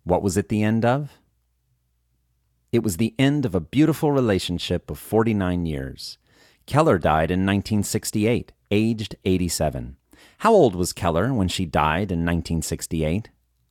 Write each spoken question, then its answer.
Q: How old was Keller when she died in 1968?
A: Keller was 87 when she died in 1968.